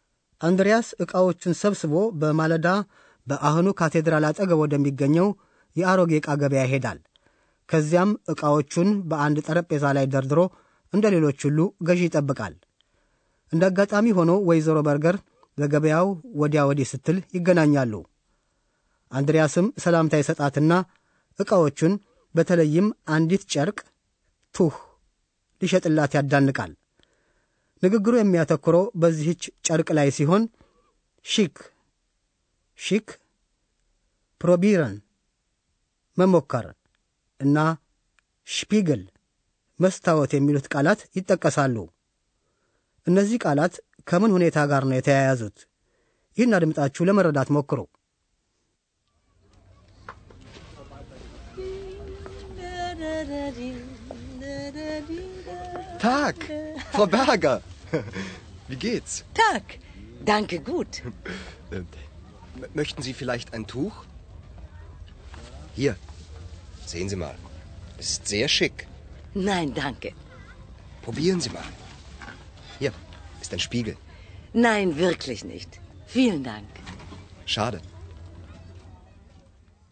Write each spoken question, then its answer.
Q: እነዚህ ቃላት ከምን ሁኔታ ጋር ነው የተያያዙት?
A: አንድሪያስ ጨርቁን ሽክ ያለ ነው በማለት ያዋድዳል። ወይዘሮ በርገር አንድ ለብሳ እንድትሞከርና በመስታወት እንድታይ ለማሳመን ነው የሚፈልገው።